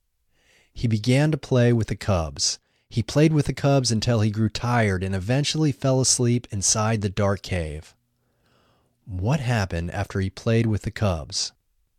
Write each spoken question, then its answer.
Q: What happened after he played with the cubs?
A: After he played with the cubs, he grew tired and eventually fell asleep inside the dark cave.